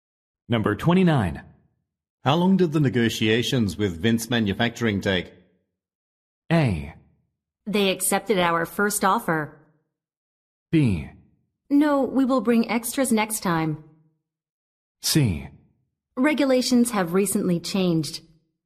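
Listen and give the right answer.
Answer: A: They accepted our first offer.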